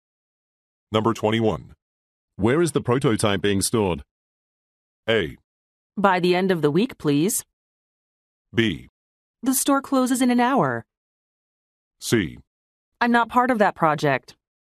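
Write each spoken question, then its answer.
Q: Where is the prototype being stored?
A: C: I'm not part of that project.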